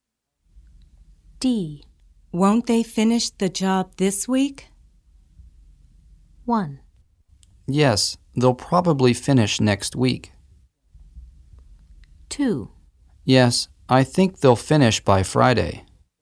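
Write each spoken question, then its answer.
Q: Won't they finish the job this week?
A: 2: Yes, I think they'll finish by Friday.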